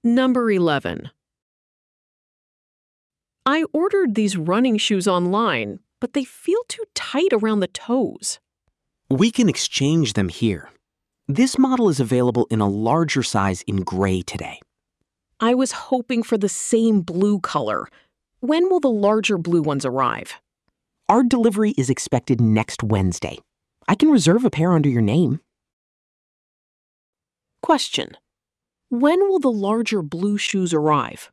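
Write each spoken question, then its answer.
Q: when will the larger blue shoes arrive?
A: Next Wednesday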